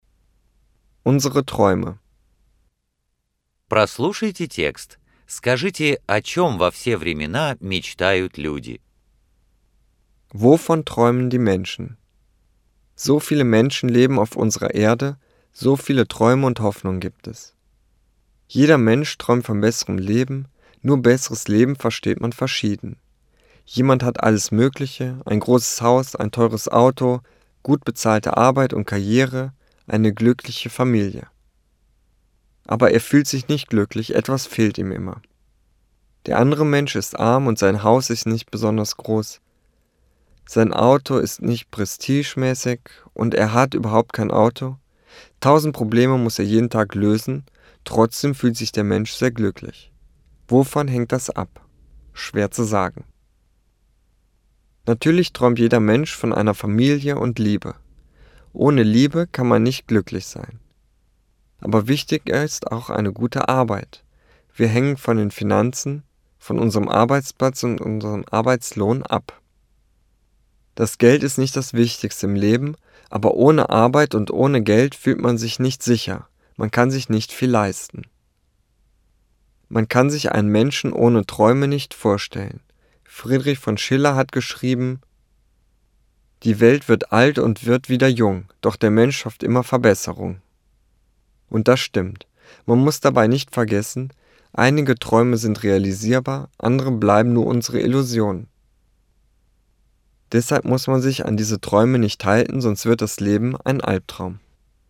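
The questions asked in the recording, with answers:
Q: Wovon träumen die Menschen?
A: Von einem besseren Leben: von Familie und Liebe, einer guten Arbeit und genug Geld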